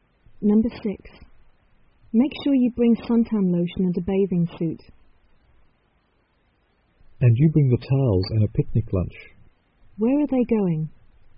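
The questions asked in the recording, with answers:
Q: Where are they going?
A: To the beach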